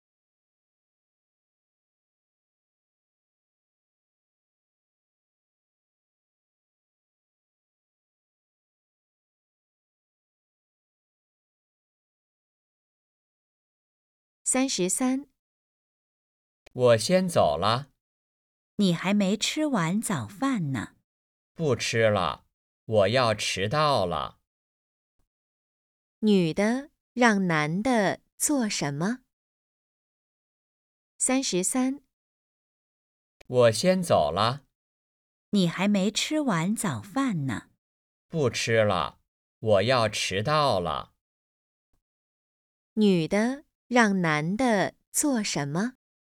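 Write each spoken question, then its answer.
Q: 女的让男的做什么?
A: 吃完早饭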